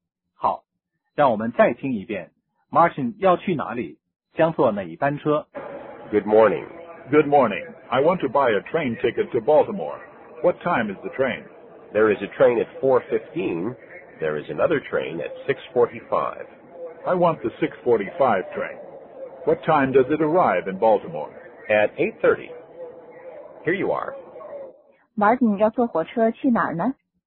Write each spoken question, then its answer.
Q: Martin 要坐火车去哪儿呢?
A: 他要回巴尔的摩。